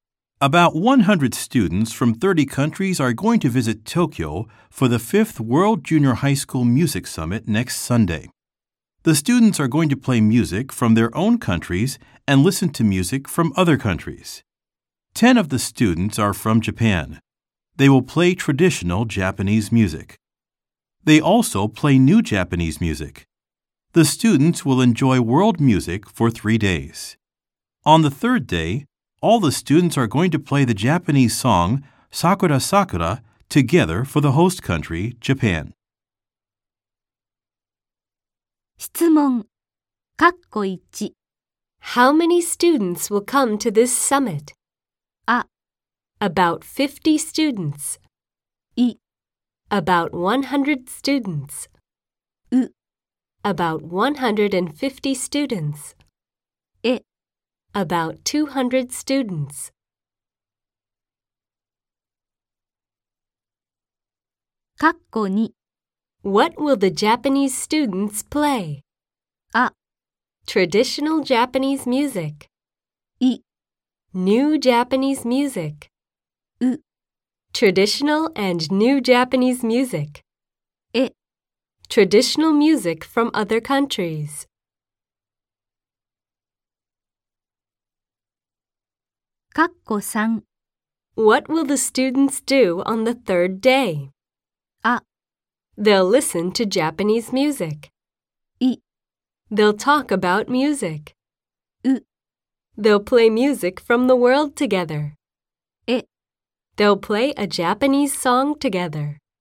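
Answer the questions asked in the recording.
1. I: About 100 students.
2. U: Traditional and new Japanese music.
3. E: They'll play a Japanese song together.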